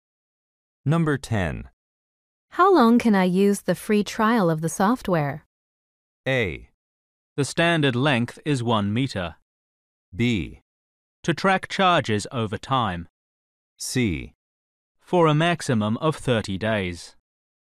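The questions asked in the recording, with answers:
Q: How long can I use the free trial of the software?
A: C: For a maximum of 30 days.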